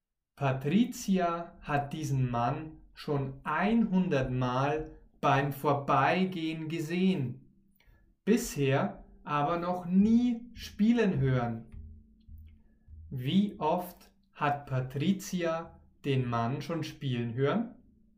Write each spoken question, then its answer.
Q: Wie oft hat Patricia den Mann schon spielen hören?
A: Noch nie. Sie hat den Mann noch nie spielen hören.